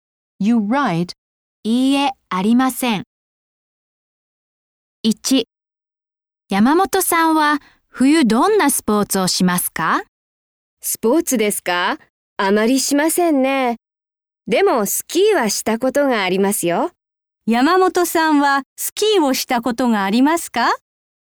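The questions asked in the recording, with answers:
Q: 山本さんはスキーをしたことがありますか?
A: はい、あります。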